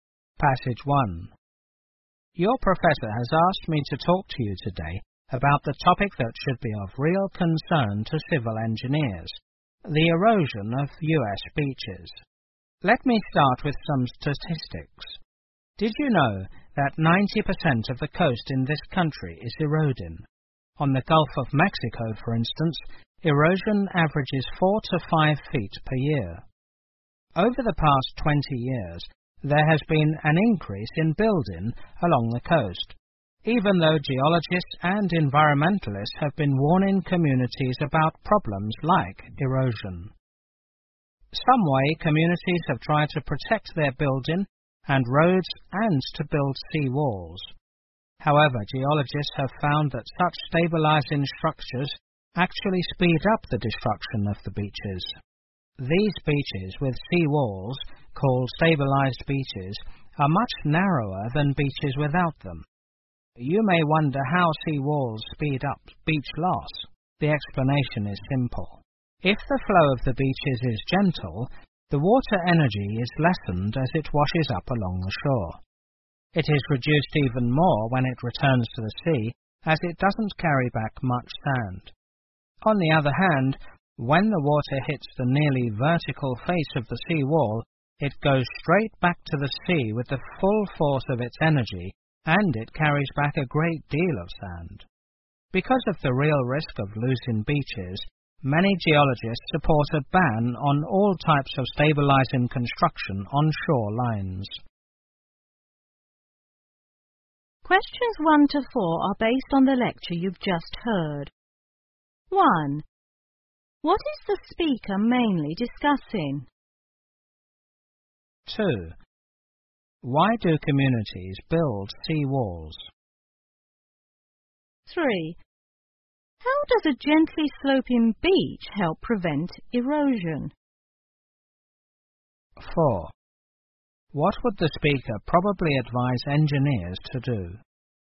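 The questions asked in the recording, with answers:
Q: What is the speaker mainly discussing?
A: The erosion of U.S. beaches

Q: Why do communities build sea walls?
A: To protect their buildings and roads

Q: How does a gently sloping beach help prevent erosion?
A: It lessens the water's energy, so less sand is carried back to the sea

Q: What would the speaker probably advise engineers to do?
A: Not to build stabilizing structures such as sea walls on shorelines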